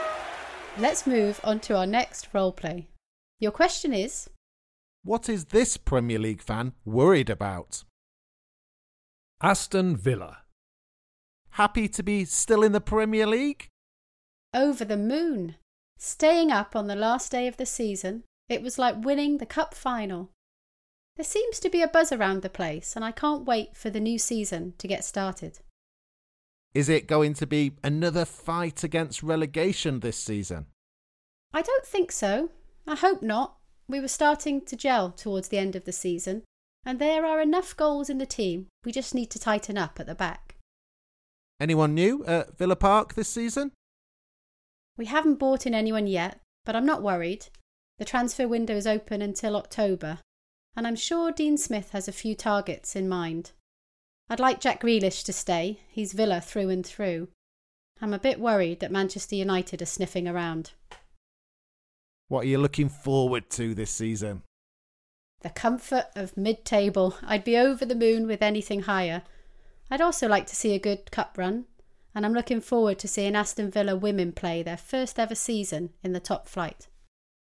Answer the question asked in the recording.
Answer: This Aston Villa fan, like many others I imagine, is worried about Jack Grealish leaving the club.